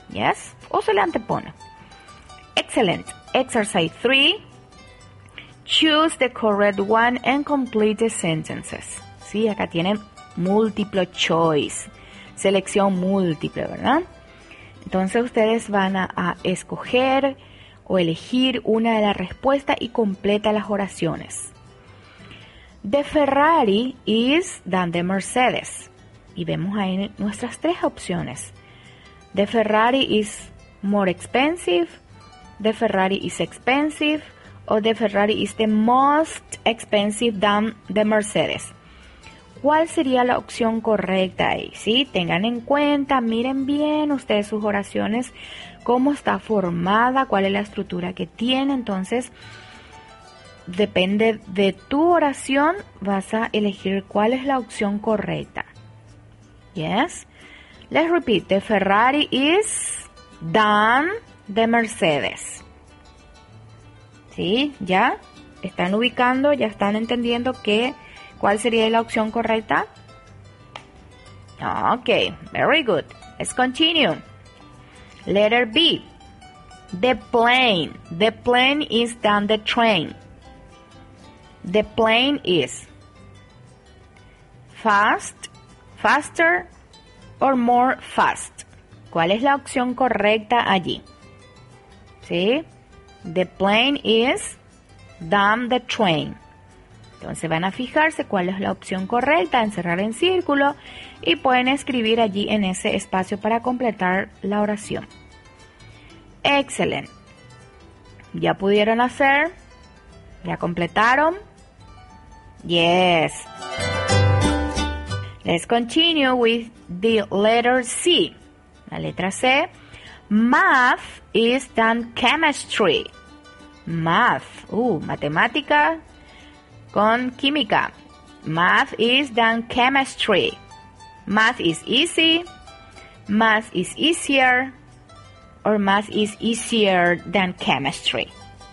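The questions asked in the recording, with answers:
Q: The Ferrari is than the Mercedes.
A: more expensive

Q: The plane is than the train.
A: faster

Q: Math is than chemistry.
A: easier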